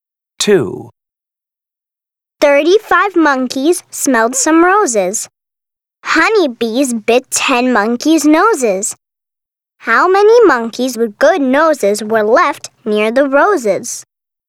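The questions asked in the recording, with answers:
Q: How many monkeys with good noses were left near the roses?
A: 25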